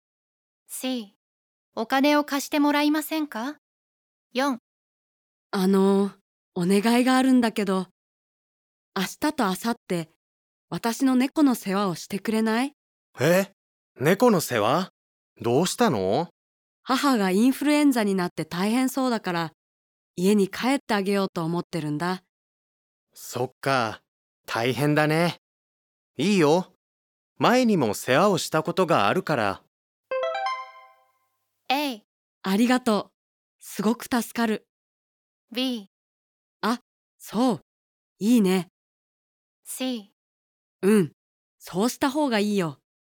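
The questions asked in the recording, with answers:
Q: そっか、大変だね。いいよ、前にも世話をしたことがあるから。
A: A: ありがとう、すごく助かる。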